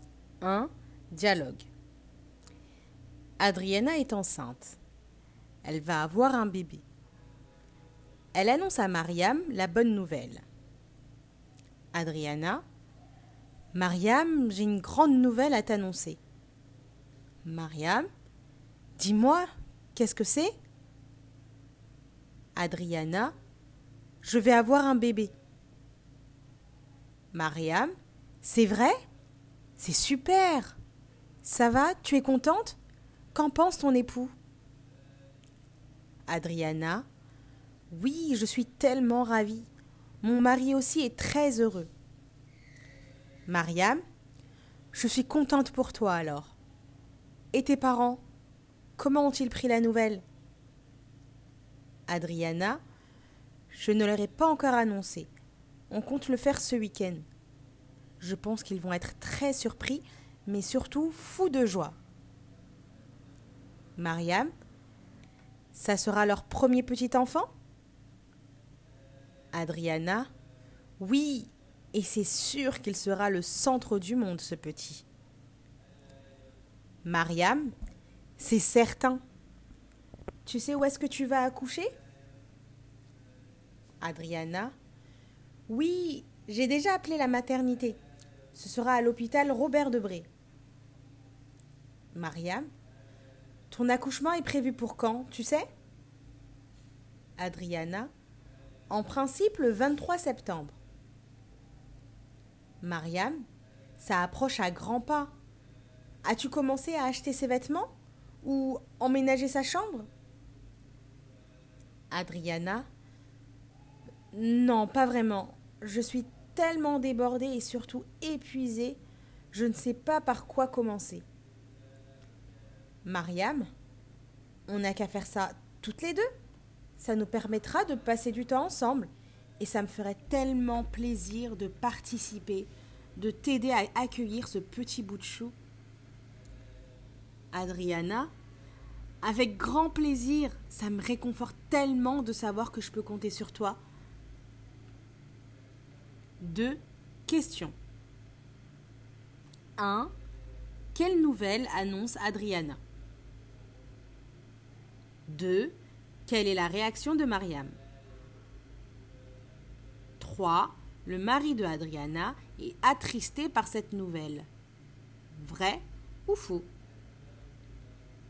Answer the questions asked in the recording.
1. Elle annonce qu'elle attend un enfant.
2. Elle est surprise.
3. Faux.